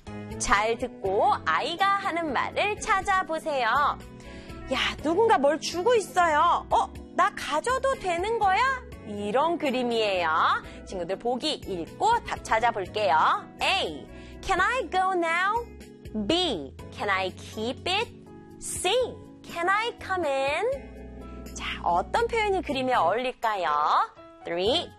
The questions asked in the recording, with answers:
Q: 잘 듣고 아이가 하는 말을 찾아보세요.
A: 하고 물어보는 거니까 can I keep it?